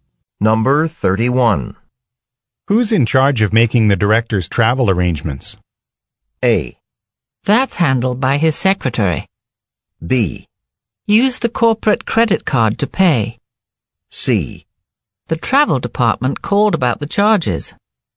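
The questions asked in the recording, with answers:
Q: Who's in charge of making the director's travel arrangements?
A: A: That's handled by his secretary.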